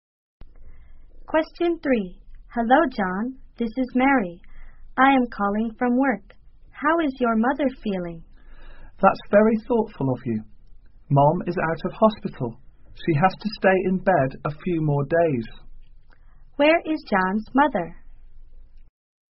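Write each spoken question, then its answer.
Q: Where is John's mother?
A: At home, in bed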